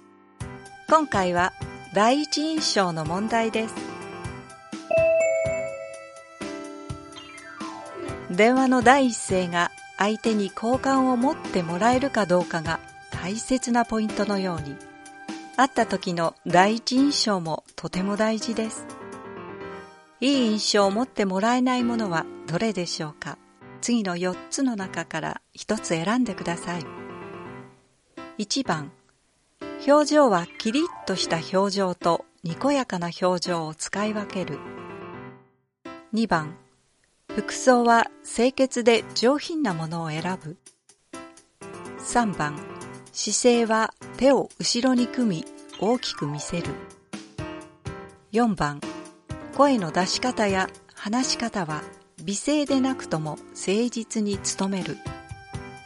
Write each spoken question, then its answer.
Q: いい印象を持ってもらえないものはどれでしょうか?次の4つの中から1つ選んでください。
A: 今回の問題の答えは3番です。